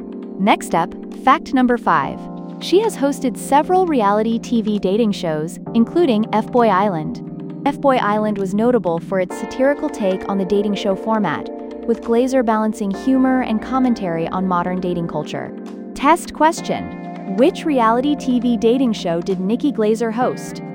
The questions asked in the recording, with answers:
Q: which reality TV dating show did Nikki Glaser host?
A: F-Boy Island.